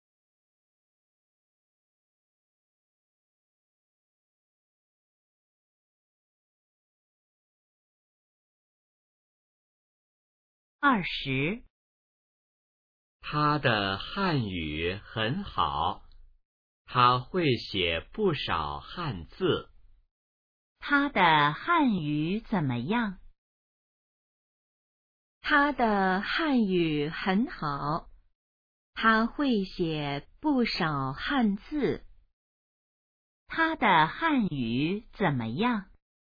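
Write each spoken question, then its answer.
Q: 他的汉语怎么样?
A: 很好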